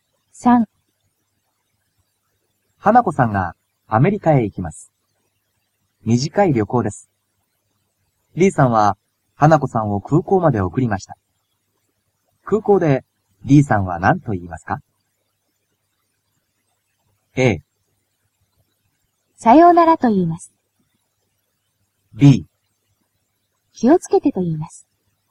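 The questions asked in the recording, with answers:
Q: 空港で D さんは何と言いますか?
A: B: 気をつけてと言います。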